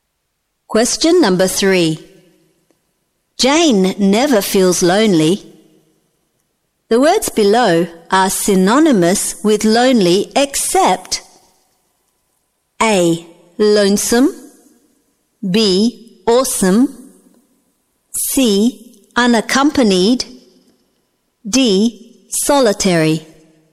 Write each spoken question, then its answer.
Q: The words below are synonymous with lonely except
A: B. Awesome.